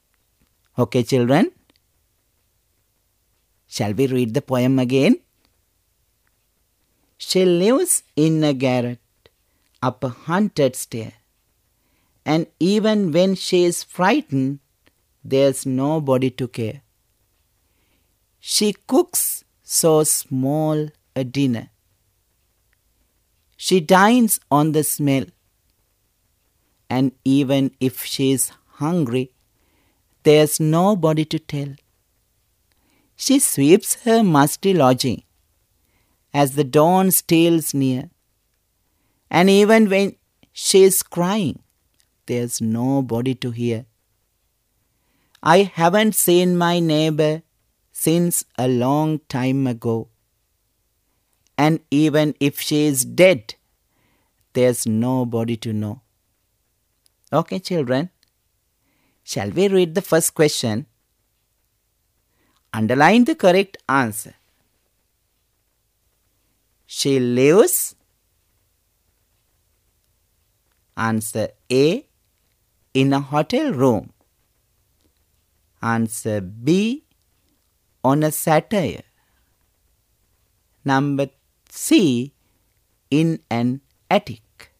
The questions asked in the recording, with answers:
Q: She lives.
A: Yes, the answer is C.